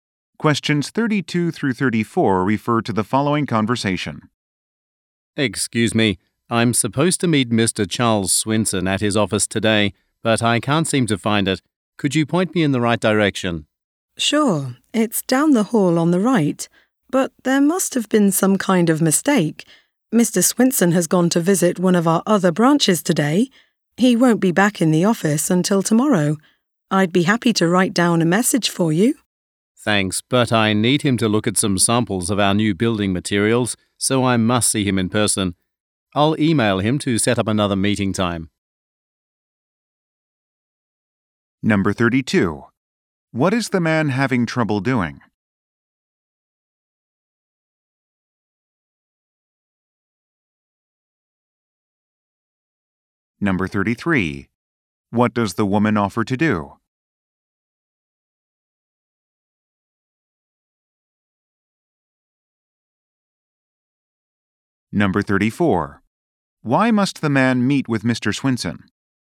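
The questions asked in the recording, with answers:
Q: What is the man having trouble doing?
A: Finding Mr. Swinson's office

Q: What does the woman offer to do?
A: Write down a message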